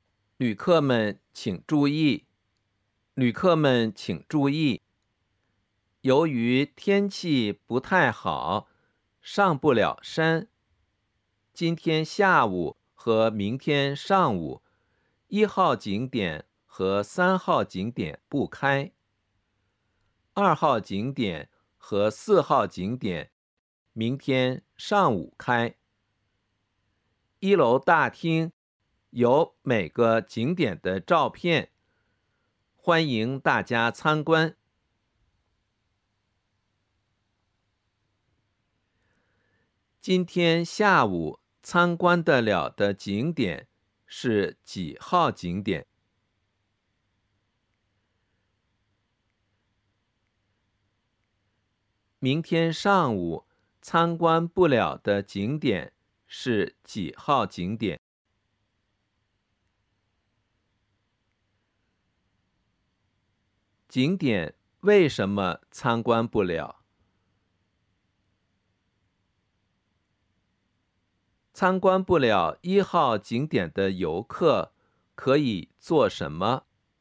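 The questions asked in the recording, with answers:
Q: 明天上午参观不了的景点是几号景点?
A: 一号和三号景点

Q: 景点为什么参观不了?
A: 天气不太好,上不了山

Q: 参观不了一号景点的游客可以做什么?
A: 去一楼大厅看景点的照片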